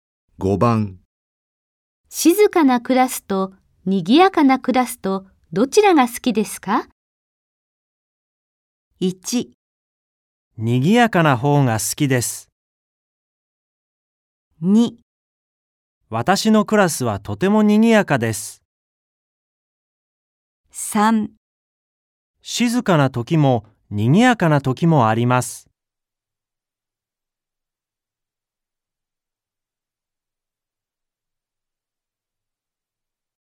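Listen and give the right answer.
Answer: 1: 賑やかな方が好きです。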